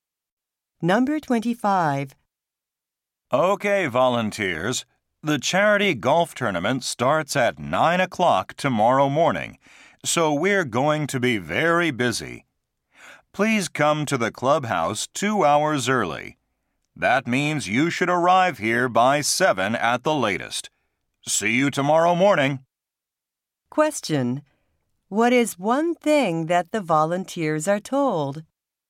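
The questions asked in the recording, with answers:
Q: What is one thing that the volunteers are told?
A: To arrive at the clubhouse by 7 at the latest.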